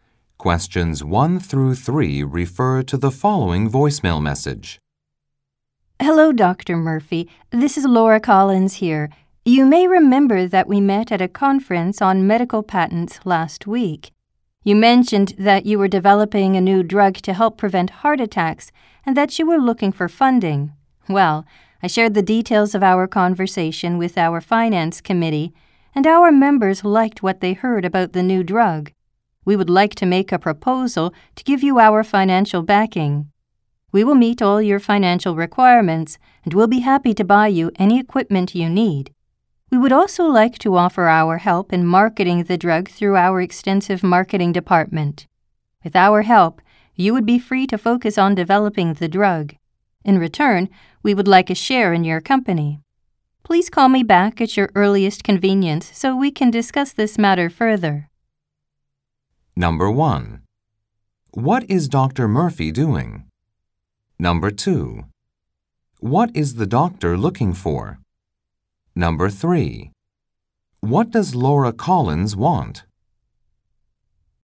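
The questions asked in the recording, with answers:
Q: What is Dr. Murphy doing?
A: Developing a new drug to help prevent heart attacks

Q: What is the doctor looking for?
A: Funding

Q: What does Laura Collins want?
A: A share in Dr. Murphy's company in return for financial backing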